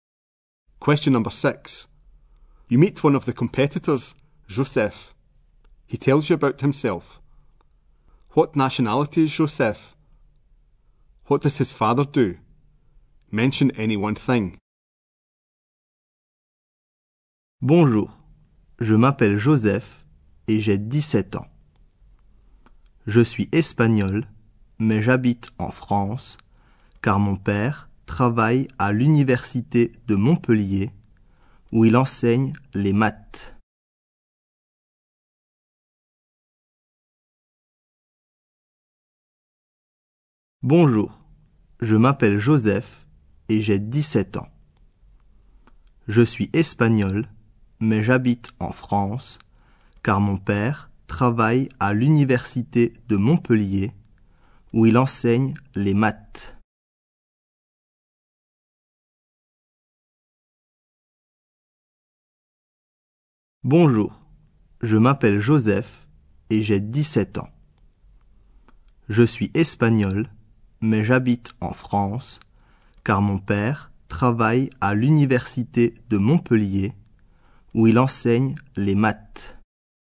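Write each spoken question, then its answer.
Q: What nationality is Joseph?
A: Spanish

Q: What does his father do? Mention any one thing.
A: Teaches maths at Montpellier university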